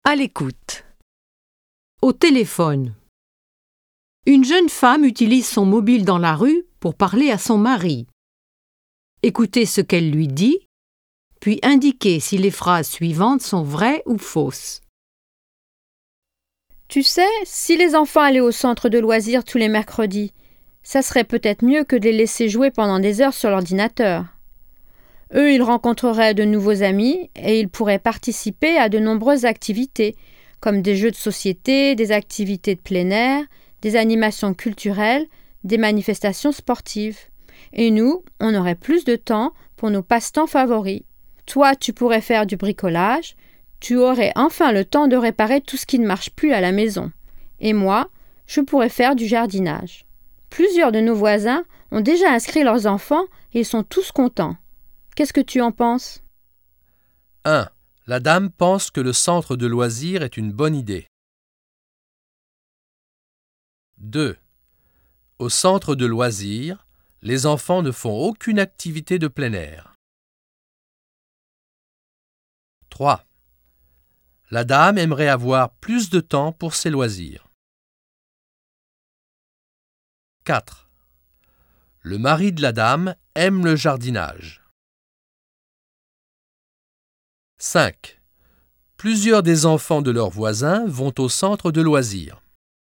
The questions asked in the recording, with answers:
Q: La dame pense que le centre de loisirs est une bonne idée.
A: 1. Vrai.

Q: Au centre de loisirs, les enfants ne font aucune activité de plein air.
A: 2. Faux.

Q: La dame aimerait avoir plus de temps pour ses loisirs.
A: 3. Vrai.

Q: Le mari de la dame aime le jardinage.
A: 4. Faux.

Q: Plusieurs des enfants de leurs voisins vont au centre de loisirs.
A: 5. Vrai.